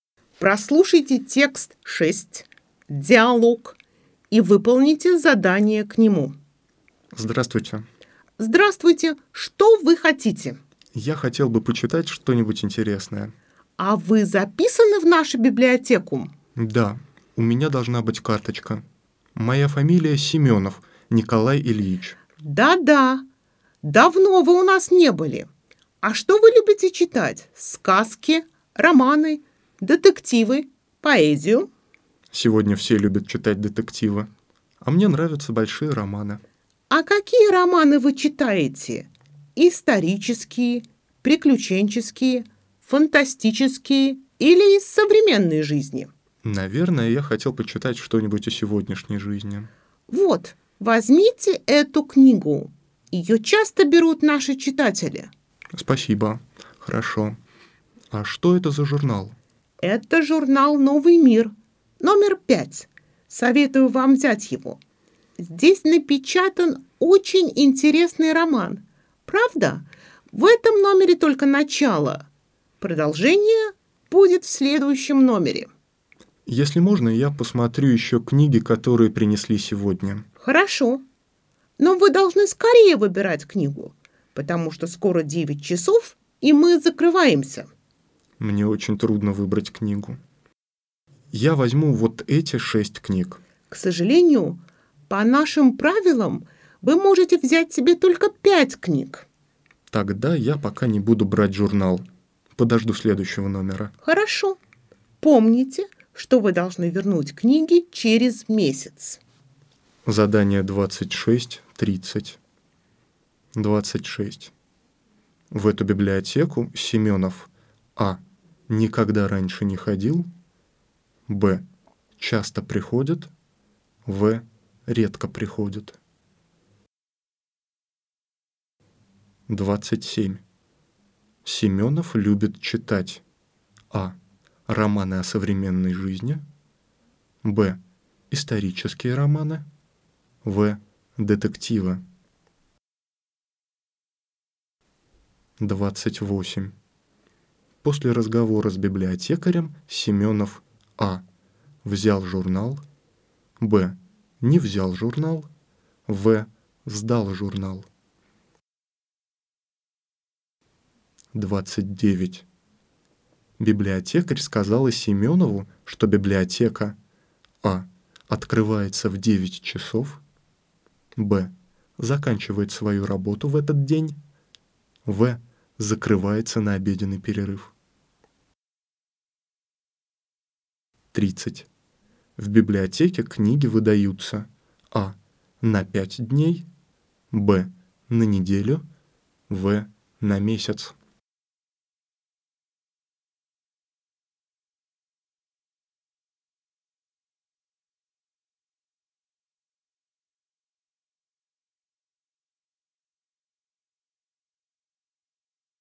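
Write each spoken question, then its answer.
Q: В эту библиотеку Семенов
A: В: редко приходит

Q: Семенов любит читать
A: А: романы о современной жизни

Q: После разговора с библиотекарем Семенов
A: Б: не взял журнал

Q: Библиотекарь сказала Семенову, что библиотека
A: Б: заканчивает свою работу в этот день

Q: В библиотеке книги выдаются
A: В: на месяц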